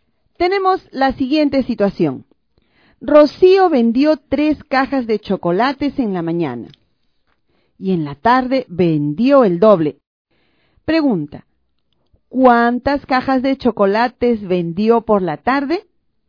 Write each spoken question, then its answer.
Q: Pregunta, ¿cuántas cajas de chocolates vendió por la tarde?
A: Rocío vendió por la tarde seis cajas de chocolates.